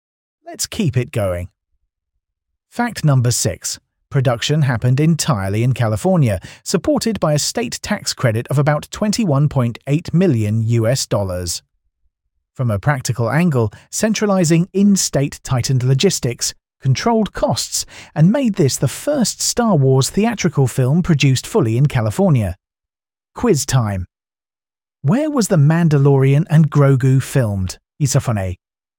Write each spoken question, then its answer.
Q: Where was The Mandalorian and Grogu filmed, Isofone?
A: Correct answer. California.